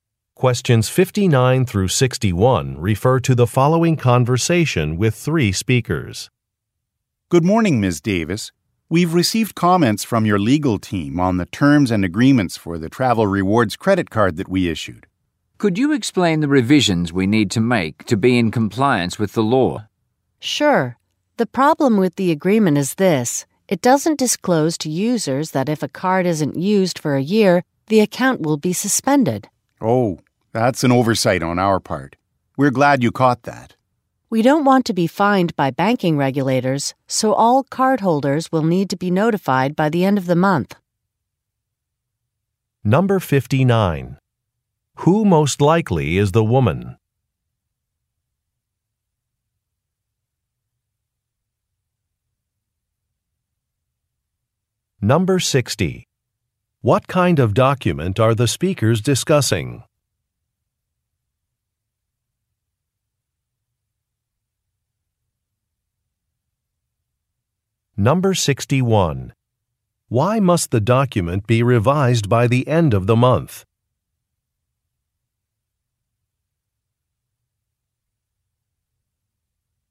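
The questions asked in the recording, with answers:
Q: What kind of document are the speakers discussing?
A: A credit card agreement

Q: Why must the document be revised by the end of the month?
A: To avoid being fined by banking regulators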